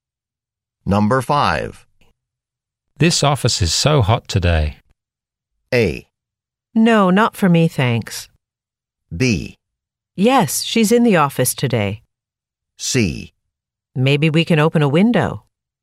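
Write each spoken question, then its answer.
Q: This office is so hot today.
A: C: Maybe we can open a window.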